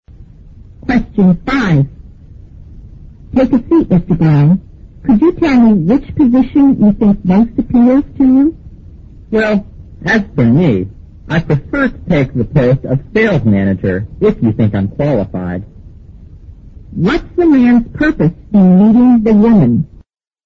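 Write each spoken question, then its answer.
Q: What's the man's purpose in meeting the woman?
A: To apply for a job (the sales manager post)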